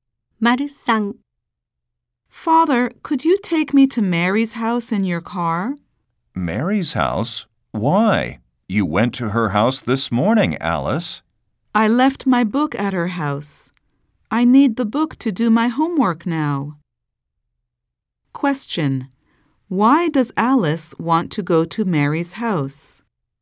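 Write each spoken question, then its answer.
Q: Why does Alice want to go to Mary's house?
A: She left her book there and needs it for her homework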